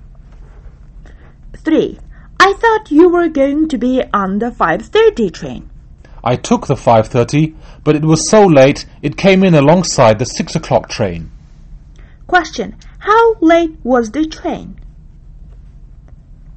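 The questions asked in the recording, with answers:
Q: How late was the train?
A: 30 minutes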